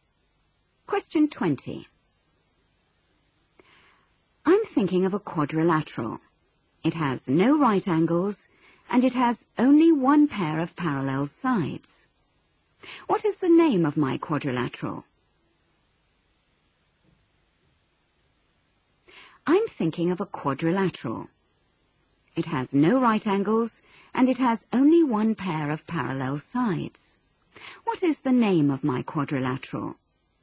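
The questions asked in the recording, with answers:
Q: What is the name of my quadrilateral?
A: Trapezium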